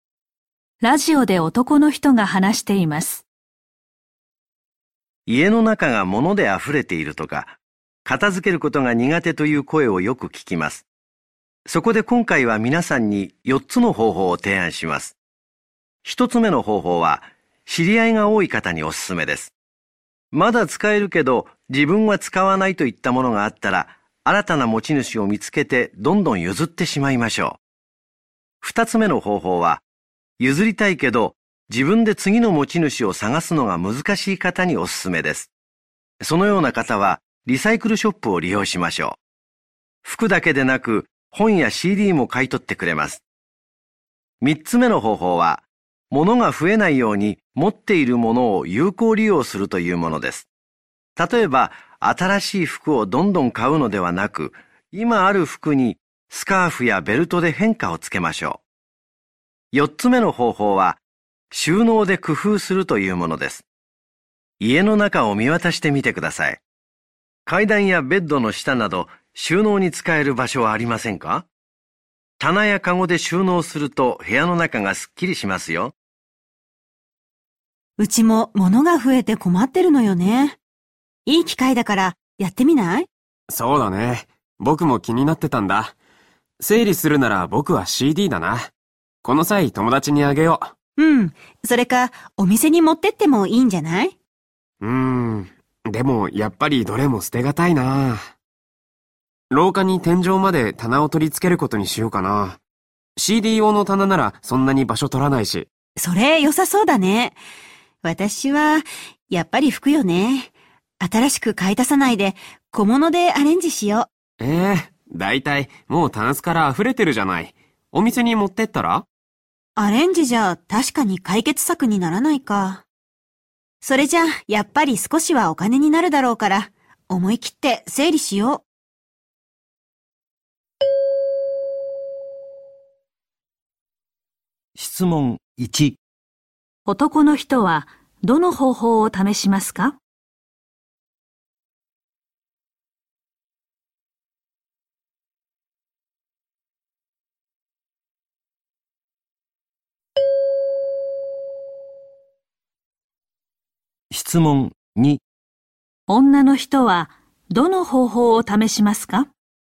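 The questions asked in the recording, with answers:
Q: 男の人はどの方法を試しますか?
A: 4つ目の方法(収納を工夫する)

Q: 女の人はどの方法を試しますか?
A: 2つ目の方法(リサイクルショップを利用する)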